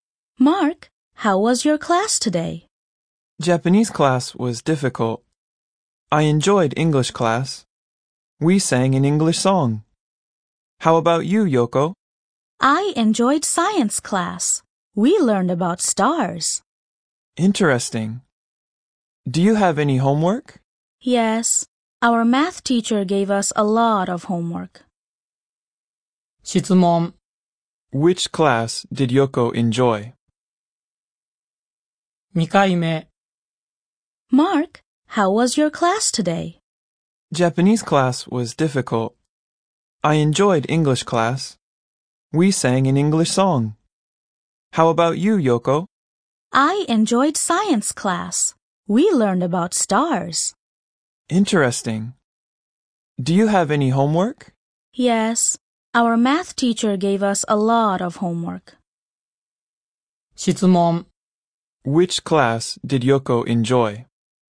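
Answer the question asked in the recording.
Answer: Science class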